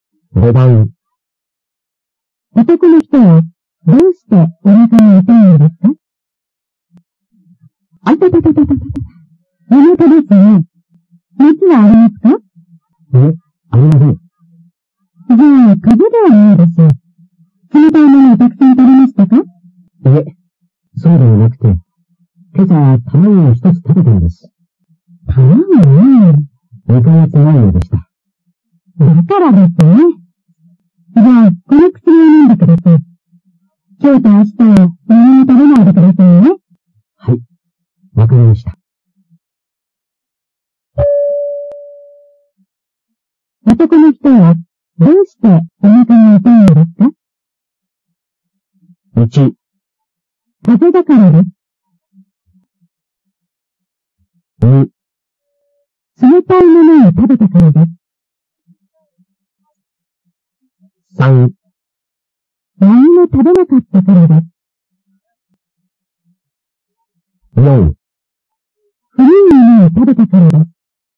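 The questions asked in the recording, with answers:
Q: 男の人はどうしてお腹が痛いのですか?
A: 4: 古いものを食べたからです。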